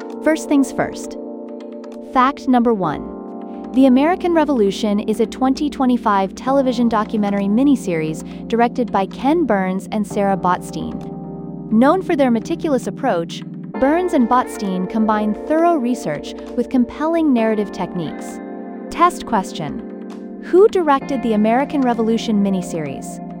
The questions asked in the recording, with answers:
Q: Who directed the American Revolution miniseries?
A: Ken Burns and Sarah Botstein.